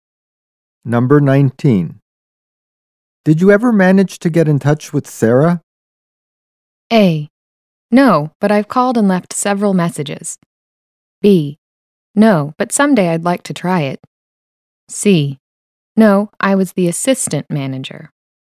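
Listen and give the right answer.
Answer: A: No, but I've called and left several messages.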